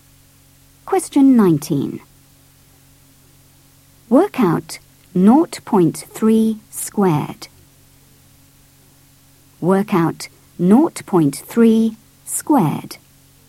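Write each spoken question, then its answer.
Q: Work out 0.3 squared.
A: 0.09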